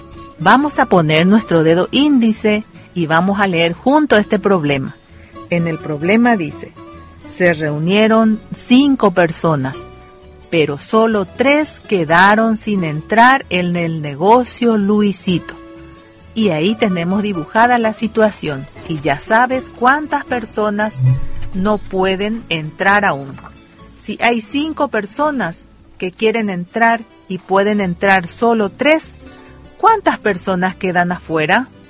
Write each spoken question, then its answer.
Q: Si hay 5 personas que quieren entrar y pueden entrar solo 3, ¿cuántas personas quedan afuera?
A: 2, profe.